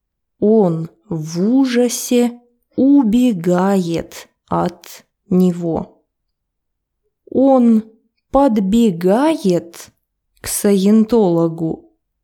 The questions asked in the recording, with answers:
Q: Он подбегает к саентологу?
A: Нет, конечно, он в ужасе убегает от него.